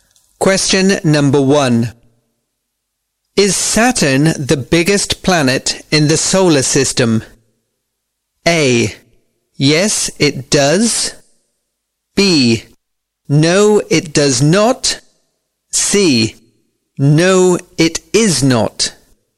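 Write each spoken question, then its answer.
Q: Is Saturn the biggest planet in the solar system?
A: C: No, it is not.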